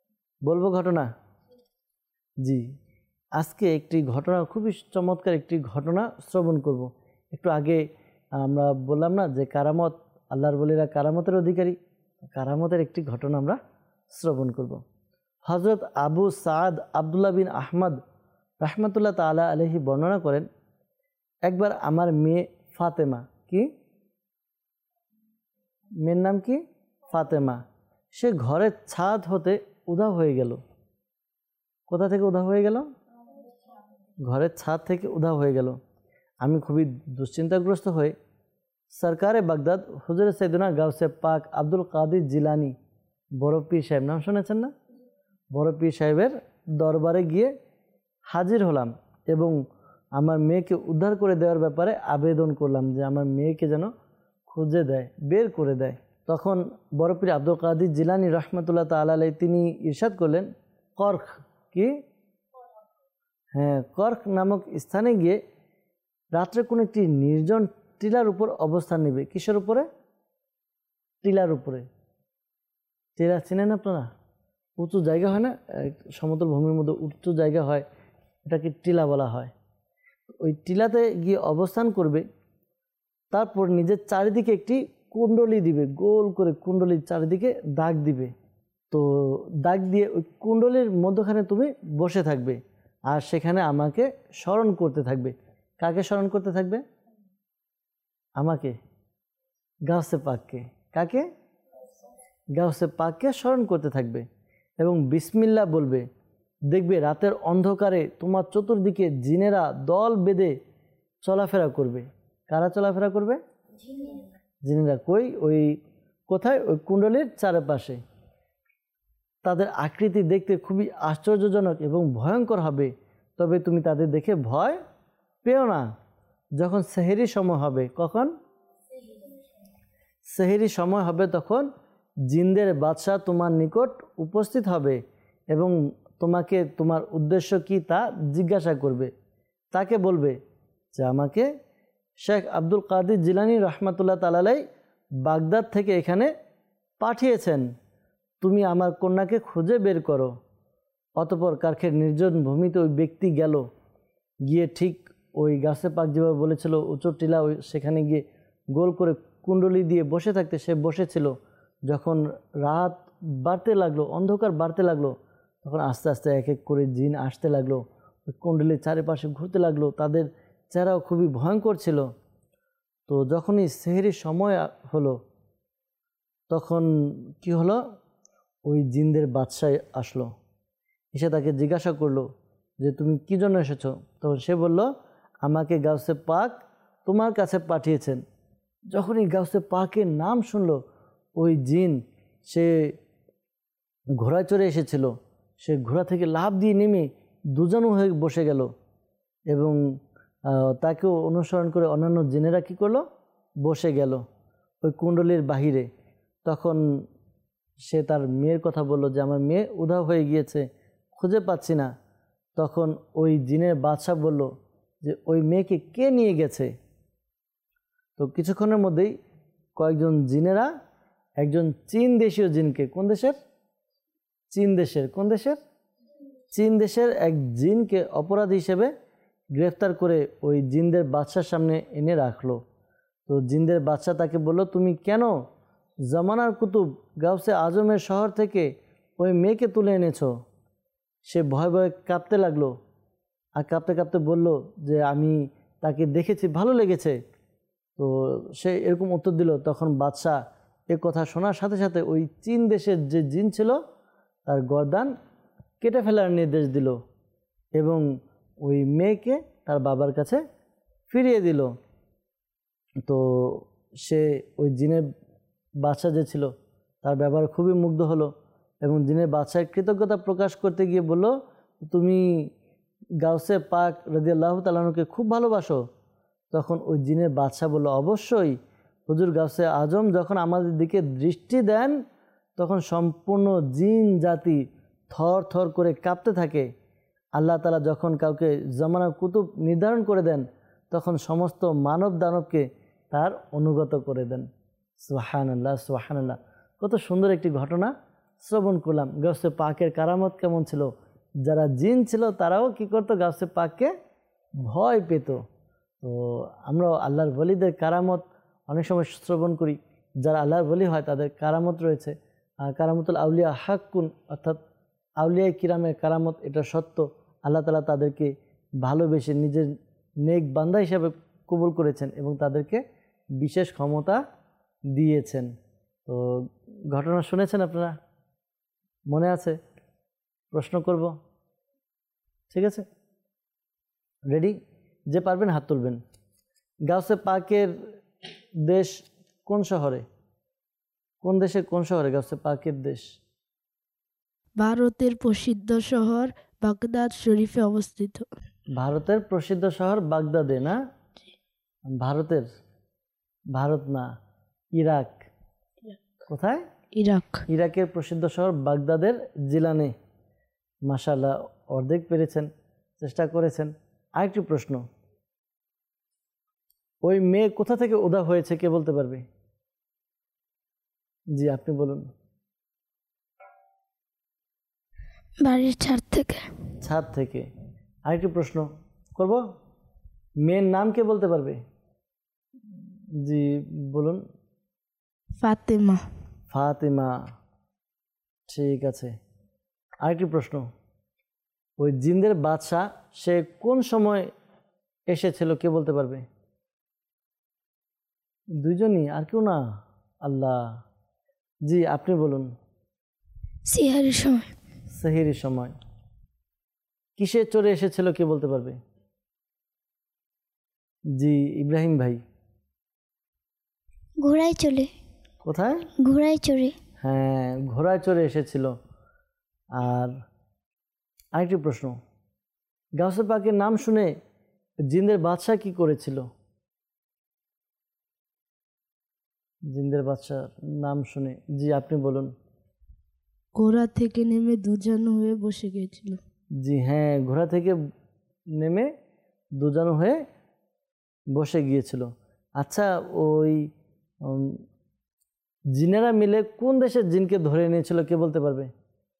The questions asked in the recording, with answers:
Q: ওই মেয়ে কোথা থেকে উধাও হয়েছে কে বলতে পারবে?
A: ছাদ থেকে।

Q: মেয়ের নাম কে বলতে পারবে?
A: ফাতেমা, ঠিক আছে।

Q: ওই জিনদের বাদশাহ সে কোন সময় এসেছিল কে বলতে পারবে?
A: সিহারির সময়।

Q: কিসে চড়ে এসেছিল কে বলতে পারবে?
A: হ্যাঁ, ঘোড়ায় চড়ে এসেছিল।

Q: গাউসে পাকের নাম শুনে জিনদের বাদশাহ কি করেছিল?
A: জি হ্যাঁ, ঘোড়া থেকে নেমে দুজন হয়ে বসে গিয়েছিল।

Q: ওই জিনেরা মিলে কোন দেশের জিনকে ধরে নিয়েছিল কে বলতে পারবে?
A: চীন দেশের, জি উত্তর সঠিক হয়েছে